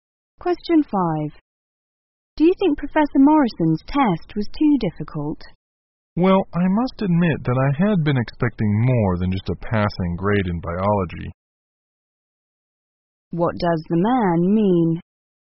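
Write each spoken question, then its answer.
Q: What does the man mean?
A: He only got a passing grade, lower than he expected.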